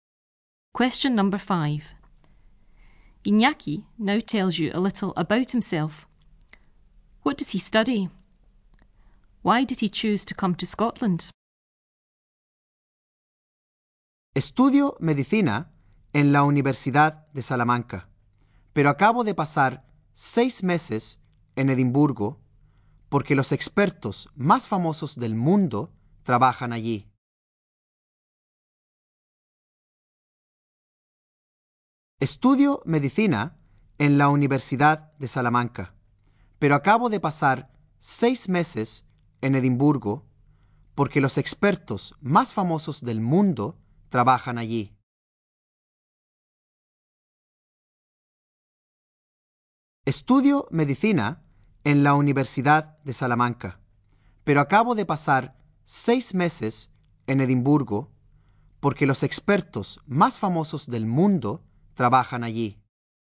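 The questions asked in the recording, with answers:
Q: What does he study?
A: Medicine (at the University of Salamanca)

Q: Why did he choose to come to Scotland?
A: Because the world's most famous experts work in Edinburgh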